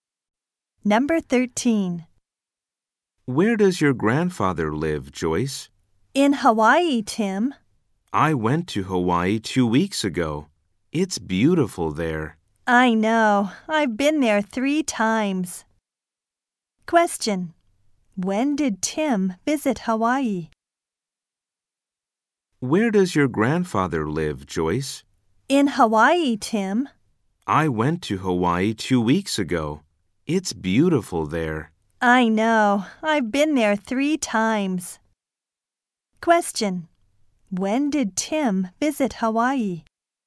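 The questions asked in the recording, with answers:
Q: When did Tim visit Hawaii?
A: Two weeks ago.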